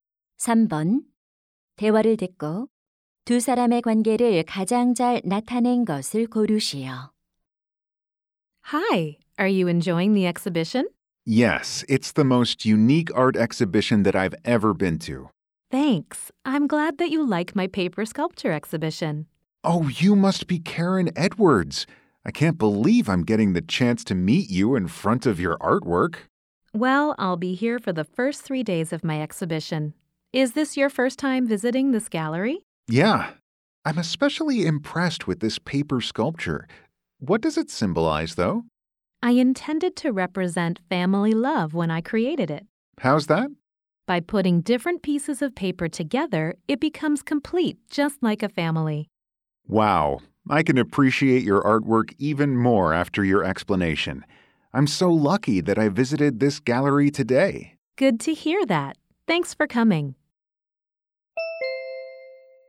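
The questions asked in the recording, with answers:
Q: 대화를 듣고 두 사람의 관계를 가장 잘 나타낸 것을 고르시오.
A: 조각가와 관람객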